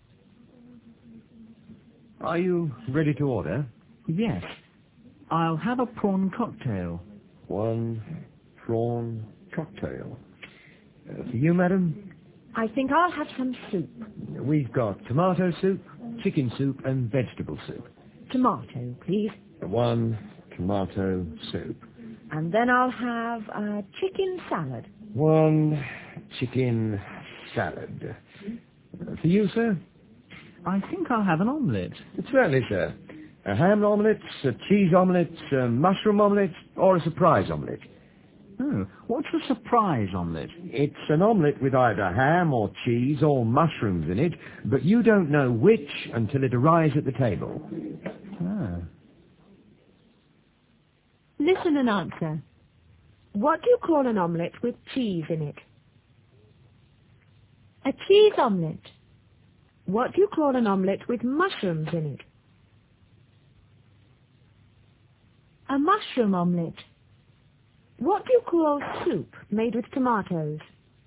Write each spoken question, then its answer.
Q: What do you call an omelette with cheese in it?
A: A cheese omelette.

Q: What do you call an omelette with mushrooms in it?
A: A mushroom omelette.

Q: What do you call soup made with tomatoes?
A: Tomato soup.